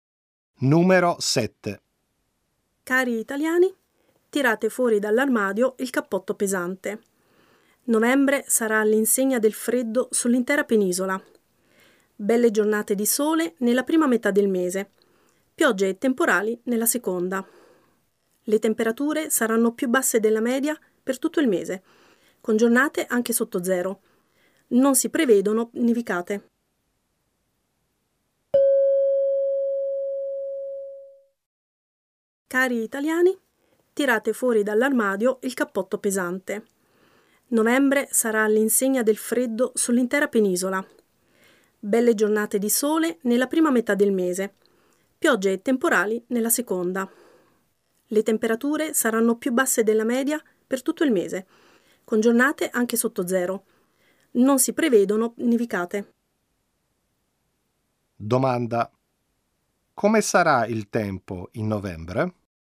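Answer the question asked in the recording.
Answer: Freddo, sole nella prima metà e piogge nella seconda, senza neve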